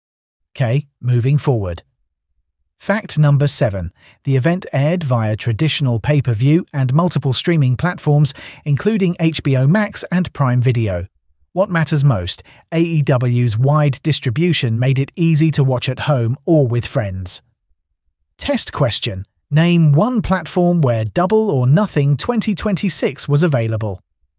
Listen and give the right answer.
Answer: HBO Max.